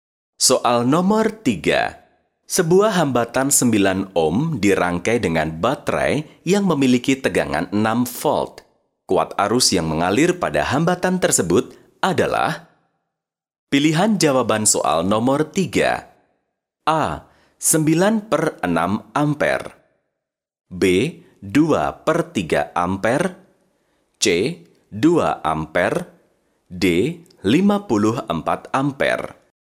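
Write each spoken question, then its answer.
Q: Kuat arus yang mengalir pada hambatan tersebut adalah?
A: B: 2/3 ampere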